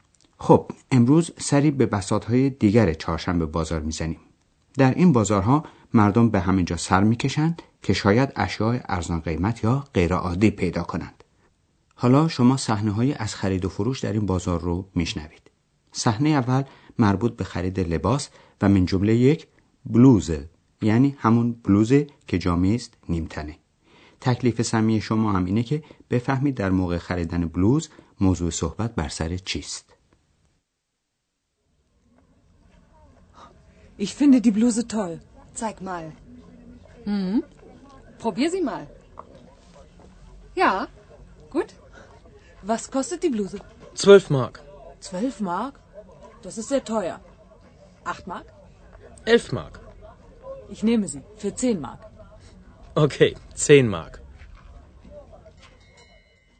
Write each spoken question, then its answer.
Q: تکلیف سمی شما هم اینه که بفهمید در موقع خریدن بلوز موضوع صحبت بر سر چیست.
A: یکی از ویژگی های چهارشنبه بازار چانه زدنه که در موقع خرید معمولی در فروشگاه ها و مغازه ها مرسوم نیست.